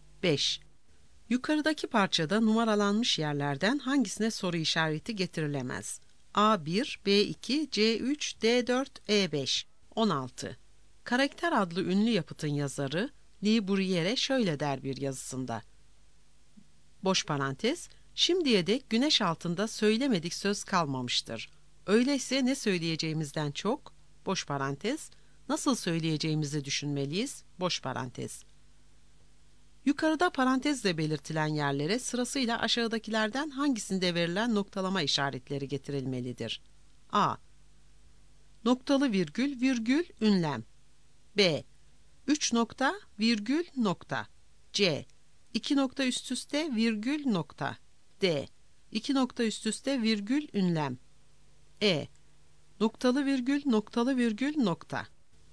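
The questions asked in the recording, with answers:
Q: Yukarıda parantezle belirtilen yerlere sırasıyla aşağıdakilerden hangisinde verilen noktalama işaretleri getirilmelidir?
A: C: İki nokta üst üste, virgül, nokta.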